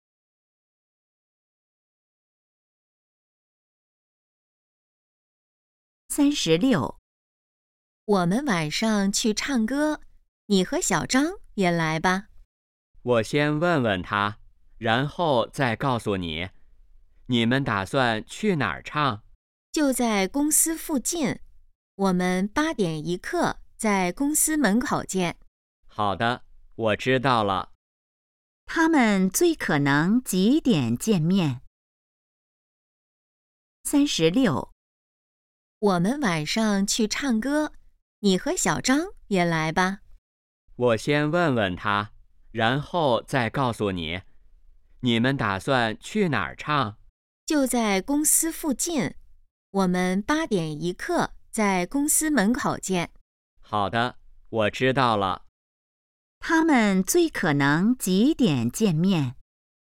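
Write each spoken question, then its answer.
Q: 他们最可能几点见面?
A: 8点15分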